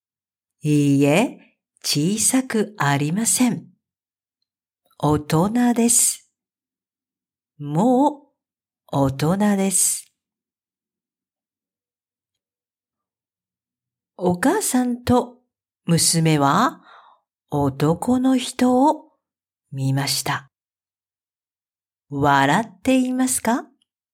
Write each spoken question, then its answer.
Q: お母さんと娘は男の人を見ました。笑っていますか?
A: いいえ、笑っていません。真剣です。真剣な顔です。